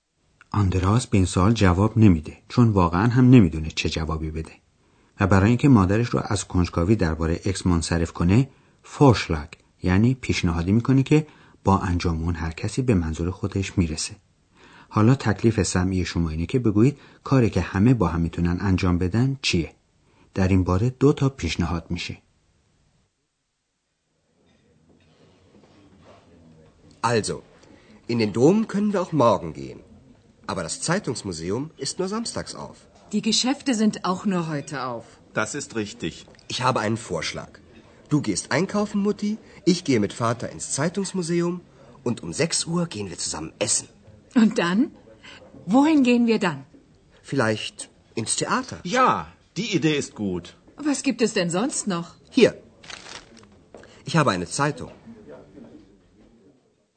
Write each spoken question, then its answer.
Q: حالا تکلیف سمعی شما اینه که بگویید کاری که همه با هم میتونن انجام بدن چیه؟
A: پس آندراس پیشنهاد کرد که غروب در ساعت شش با هم برن بیرون غذا بخورن و بعد از اون برن تئاتر.